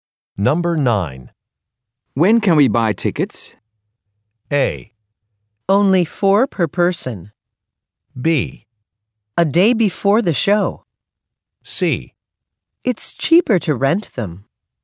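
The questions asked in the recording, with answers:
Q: When can we buy tickets?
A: B: A day before the show.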